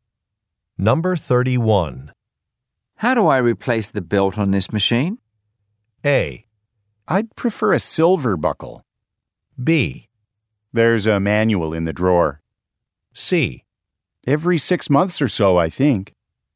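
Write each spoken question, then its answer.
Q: How do I replace the belt on this machine?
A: B: There's a manual in the drawer.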